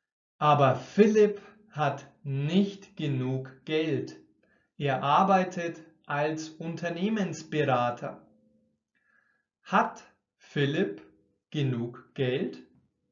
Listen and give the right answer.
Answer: Nein, mm -mm. er hat nicht genug oder genügend Geld.